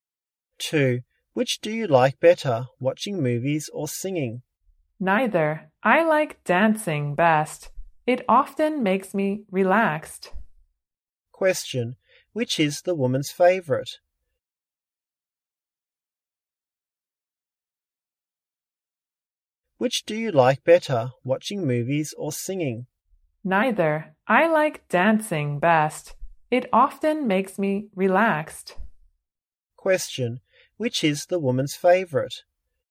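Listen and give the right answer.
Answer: Dancing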